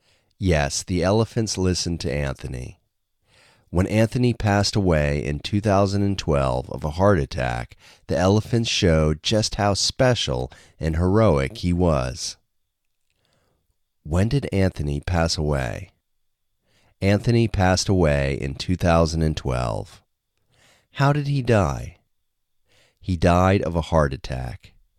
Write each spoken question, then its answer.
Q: When did Anthony pass away?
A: Anthony passed away in 2012.